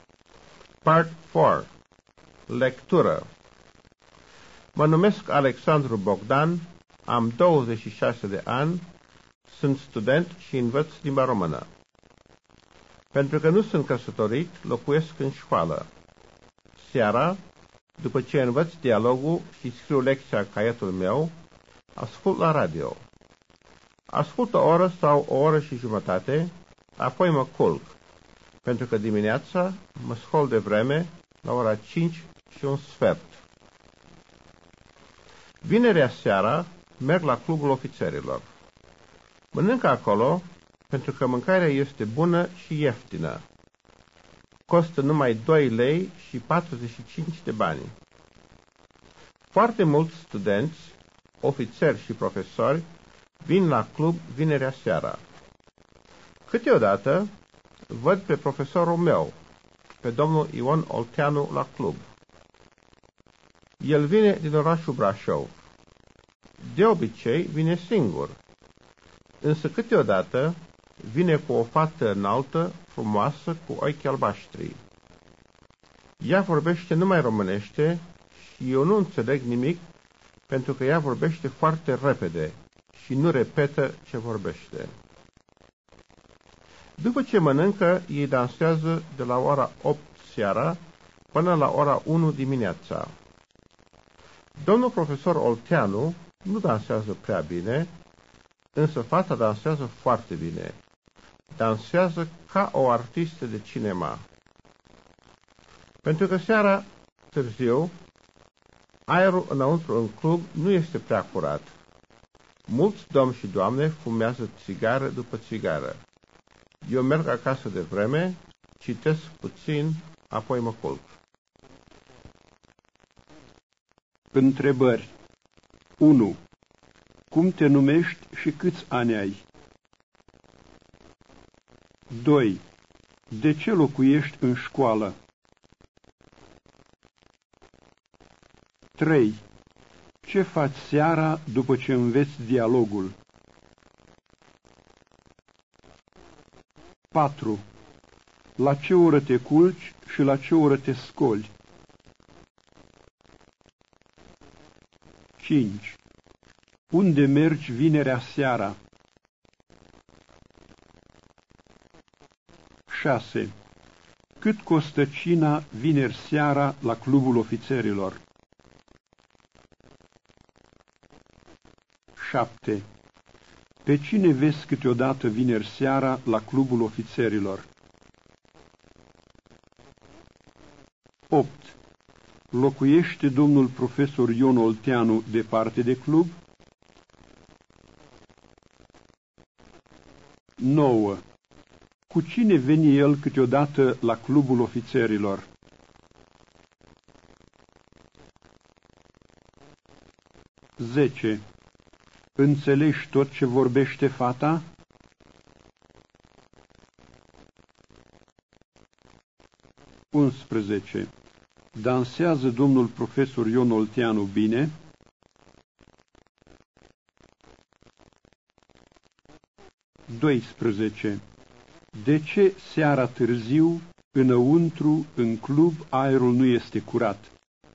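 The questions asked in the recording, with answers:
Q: Cum te numești și câți ani ai?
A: Alexandru Bogdan, 26 de ani.

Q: De ce locuiești în școală?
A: Pentru că nu sunt căsătorit.

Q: Ce faci seara după ce înveți dialogul?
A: Scriu lecția și ascult la radio.

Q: Unde mergi vinerea seara?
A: La clubul ofițerilor.

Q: Cât costă cina vineri seara la Clubul Ofițerilor?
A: 2 lei și 45 de bani.

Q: Pe cine vezi câteodată vineri seara la Clubul Ofițerilor?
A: Pe profesorul Ion Olteanu.

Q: Cu cine veni el câteodată la Clubul Ofițerilor?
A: Cu o fată înaltă, frumoasă, cu ochi albaștri.

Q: Înțelegi tot ce vorbește fata?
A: Nu, nu înțeleg nimic.

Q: Dansează domnul profesor Ion Olteanu bine?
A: Nu prea bine.

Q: De ce seara târziu, înăuntru, în club, aerul nu este curat?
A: Pentru că mulți domni și doamne fumează.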